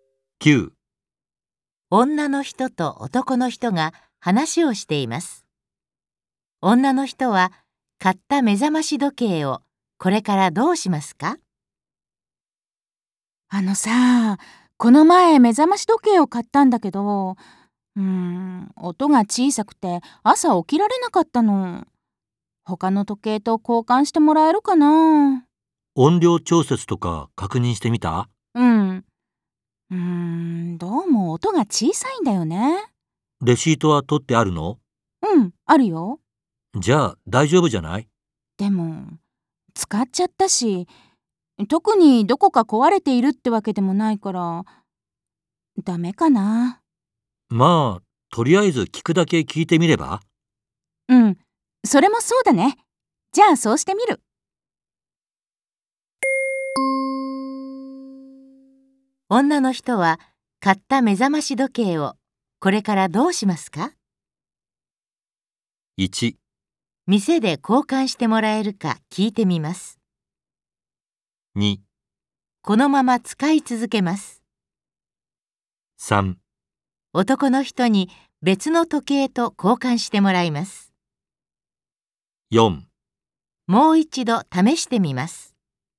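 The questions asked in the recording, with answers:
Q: 女の人は買った目覚まし時計をこれからどうしますか?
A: 1: 店で交換してもらえるか聞いてみます。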